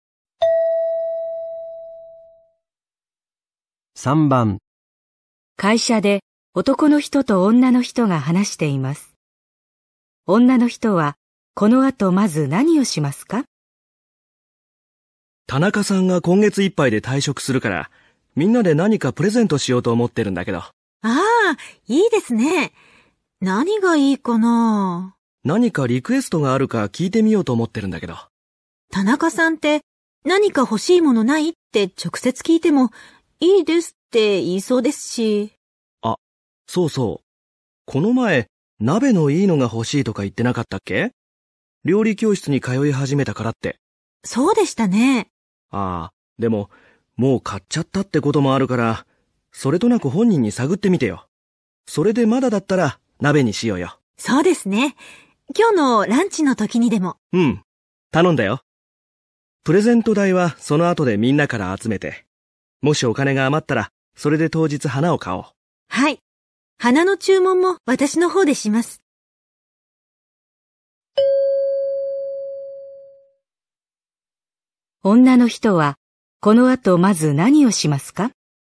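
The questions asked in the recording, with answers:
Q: 女の人は、この後まず何をしますか?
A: 田中さんに鍋をもう買ったかそれとなく聞く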